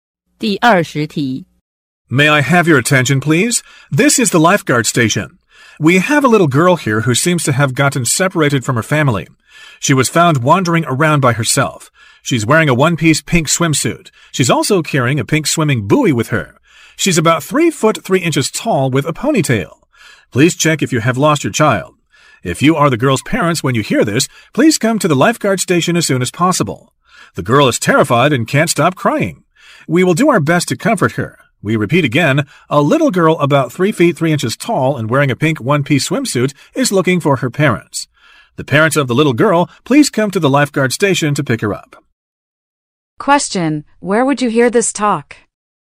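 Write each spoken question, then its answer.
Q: where would you hear this talk?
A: At a swimming pool or beach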